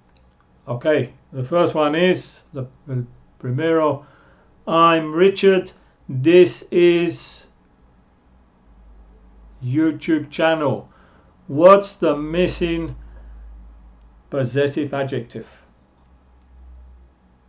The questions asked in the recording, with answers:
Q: What's the missing possessive adjective?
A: And the answer is my